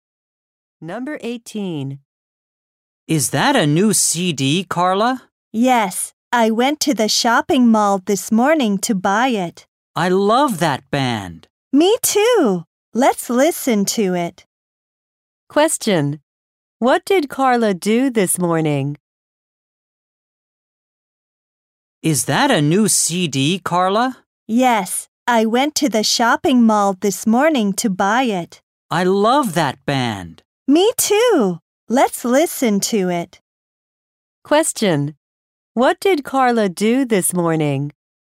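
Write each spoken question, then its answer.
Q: What did Carla do this morning?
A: She went to the shopping mall to buy a CD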